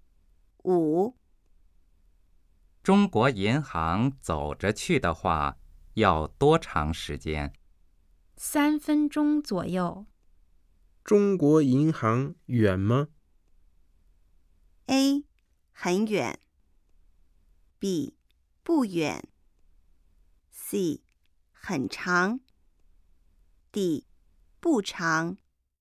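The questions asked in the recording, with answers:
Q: 中国银行远吗?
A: B: 不远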